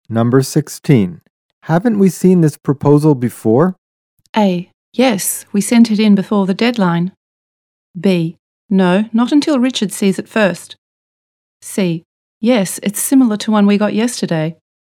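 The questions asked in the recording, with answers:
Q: Haven't we seen this proposal before?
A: C: Yes, it's similar to one we got yesterday.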